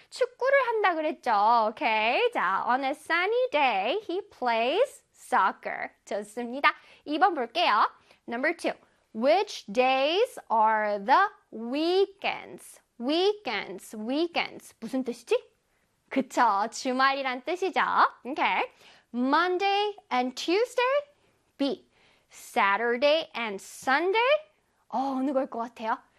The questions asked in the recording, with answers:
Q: Which days are the weekends?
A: Saturday and Sunday가 되겠죠.